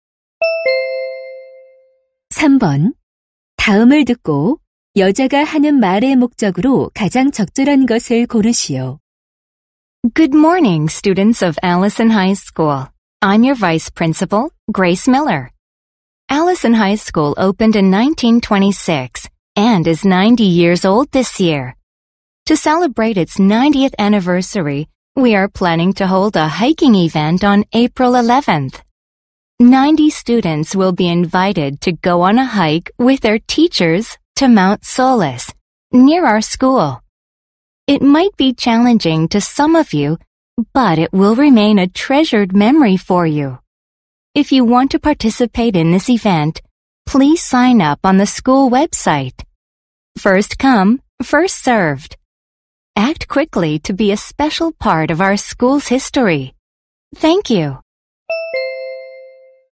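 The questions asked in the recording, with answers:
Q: 다음을 듣고 여자가 하는 말의 목적으로 가장 적절한 것을 고르시오.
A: 개교 90주년 기념 등산 행사 참가 신청을 독려하려고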